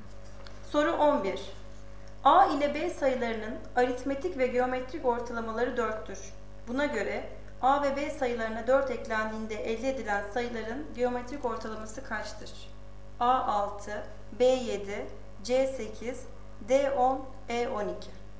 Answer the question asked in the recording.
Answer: Doğru cevap C 8.